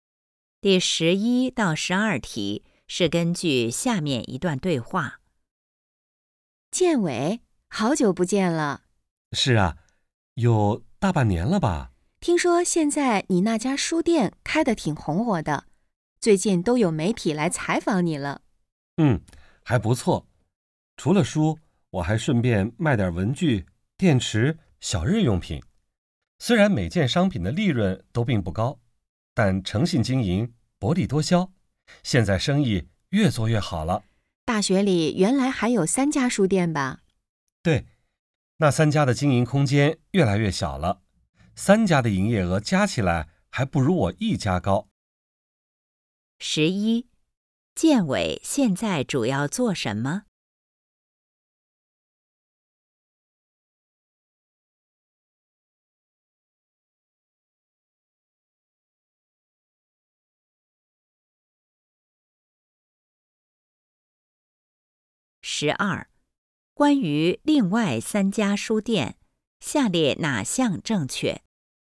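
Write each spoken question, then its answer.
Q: 建伟现在主要做什么?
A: 开书店

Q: 关于另外三家书店,下列哪项正确?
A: 经营空间越来越小,三家营业额加起来不如建伟一家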